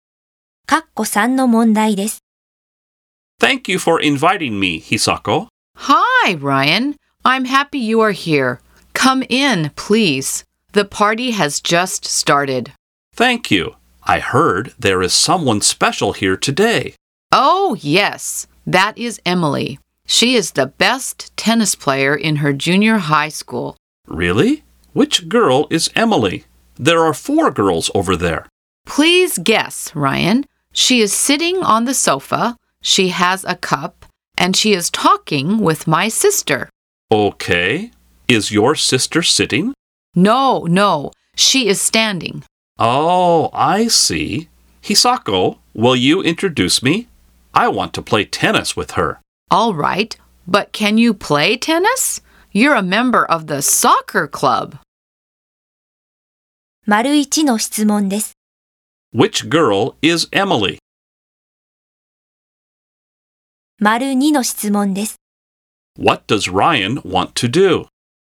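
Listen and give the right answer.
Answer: Play tennis with Emily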